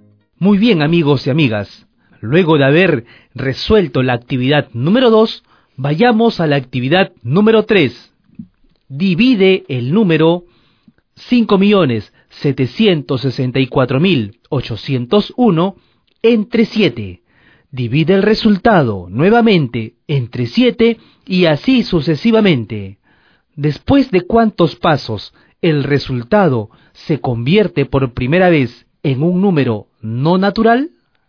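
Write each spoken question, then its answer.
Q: Después de cuántos pasos el resultado se convierte por primera vez en un número no natural.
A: Después de 9 pasos (5.764.801 = 7^8; la novena división da 1/7)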